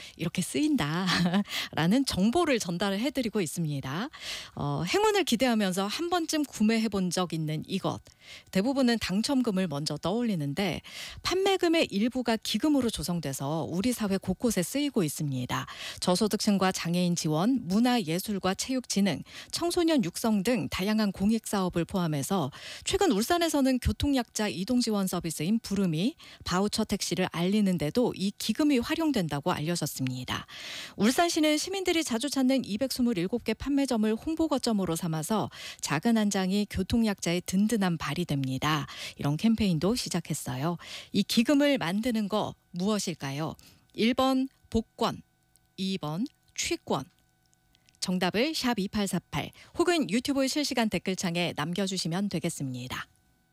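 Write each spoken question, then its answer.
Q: 이 기금을 만드는 거 무엇일까요?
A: 1: 복권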